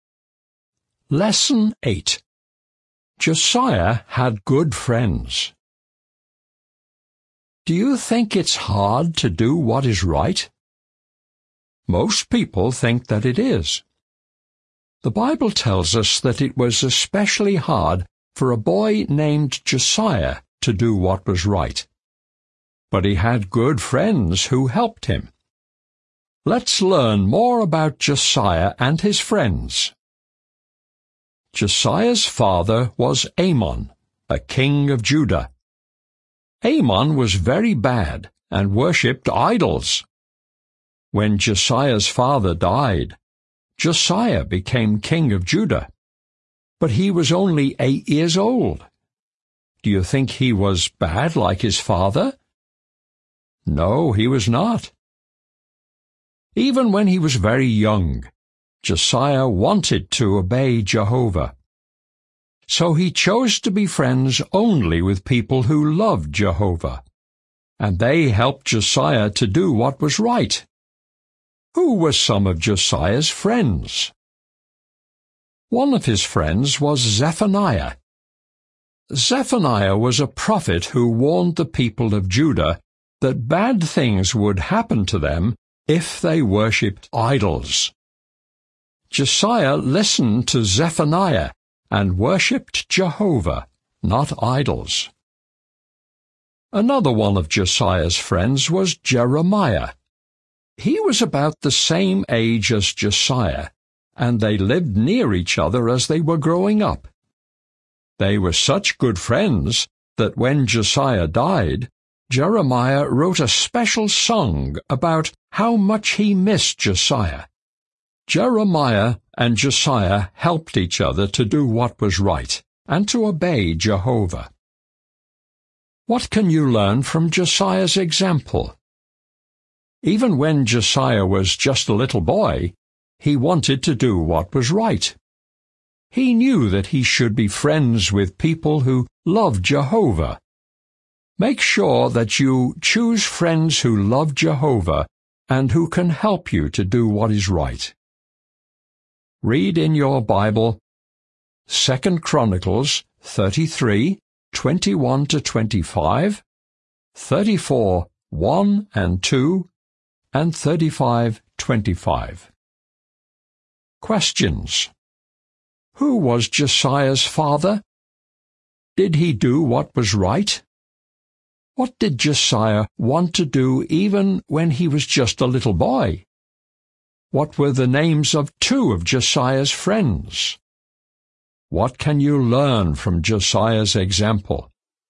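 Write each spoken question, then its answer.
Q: Who was Josiah's father? Did he do what was right?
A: Amon, a king of Judah; no, he was very bad and worshipped idols

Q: What did Josiah want to do even when he was just a little boy?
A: Obey Jehovah and do what was right

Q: What were the names of two of Josiah's friends?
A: Zephaniah and Jeremiah

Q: What can you learn from Josiah's example?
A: Choose friends who love Jehovah and can help you do what is right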